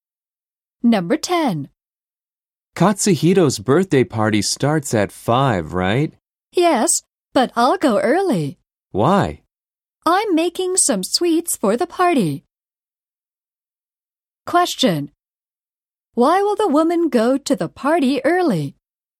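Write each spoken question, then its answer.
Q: Why will the woman go to the party early?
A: To make some sweets for the party.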